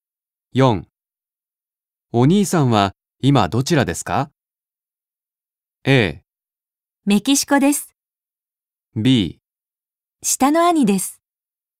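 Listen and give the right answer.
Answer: A: メキシコです。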